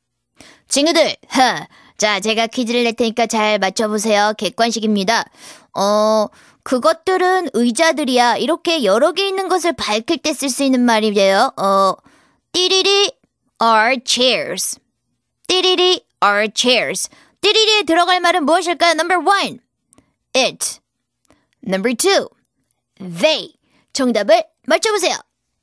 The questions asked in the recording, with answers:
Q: 띠리리에 들어갈 말은 무엇일까요? Number one, it. Number two, they.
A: 정답은 바로 2번이죠.